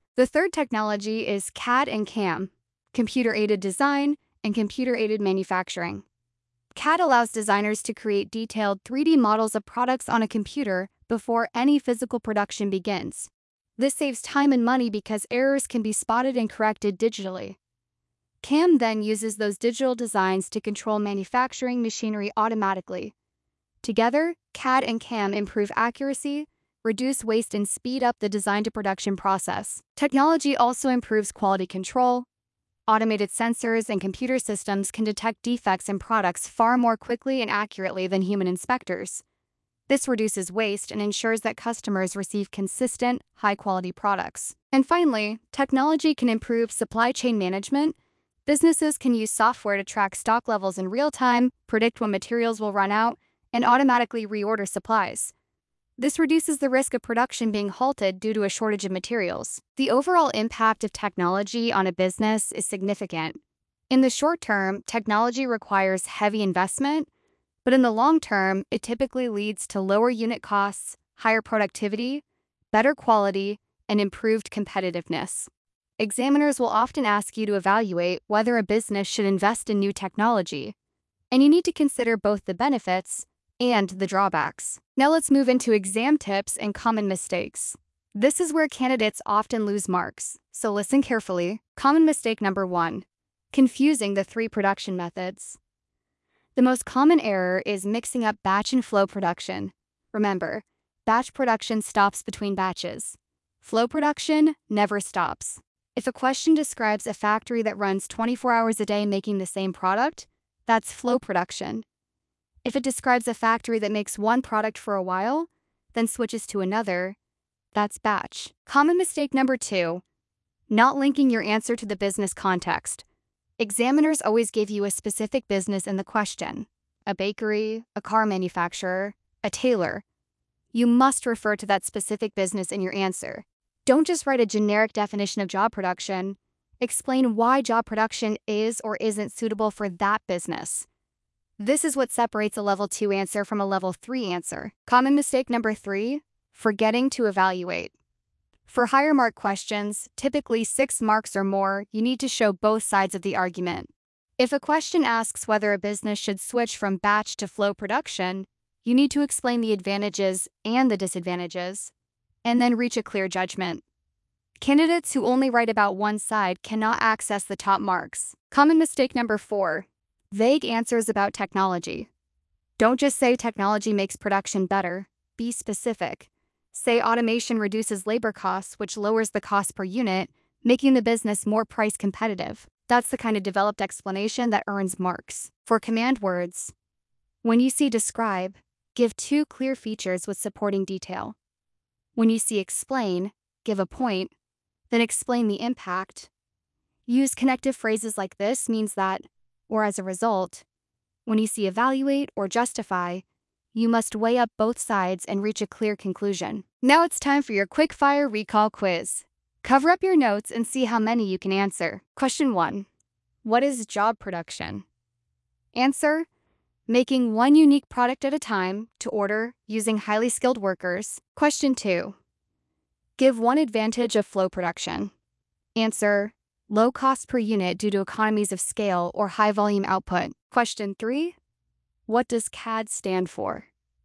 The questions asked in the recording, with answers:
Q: what does CAD stand for?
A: Answer, computer-aided design.